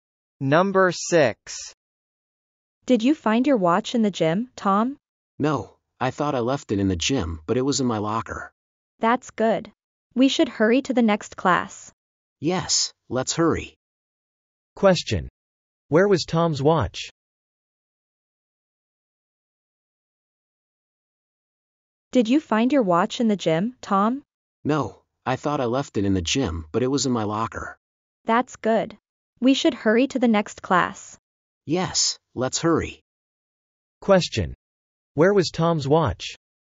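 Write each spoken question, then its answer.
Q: Question. Where was Tom's watch?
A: In his locker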